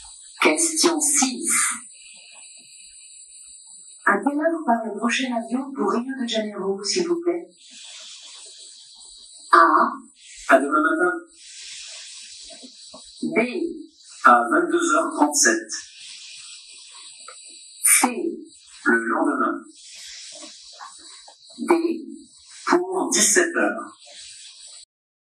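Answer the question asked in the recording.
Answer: B: À 22h37.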